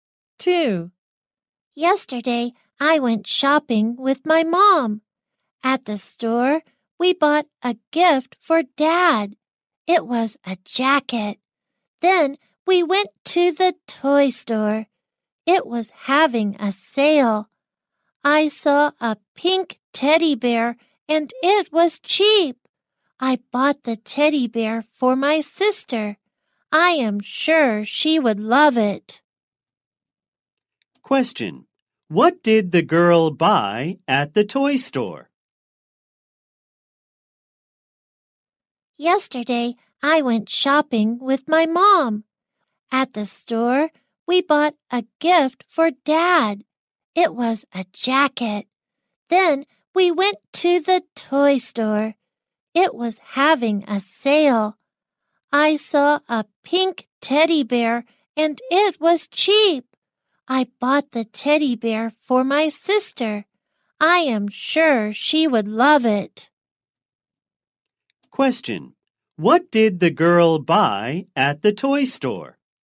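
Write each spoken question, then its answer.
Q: Question.What did the girl buy at the toy store?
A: A pink teddy bear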